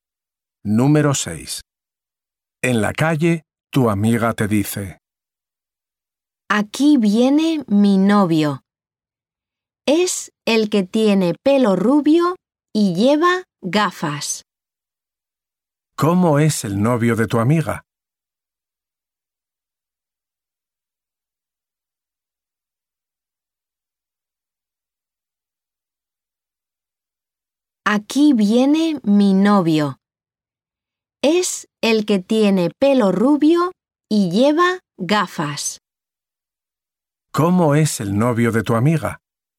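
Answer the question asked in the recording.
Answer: Tiene pelo rubio y lleva gafas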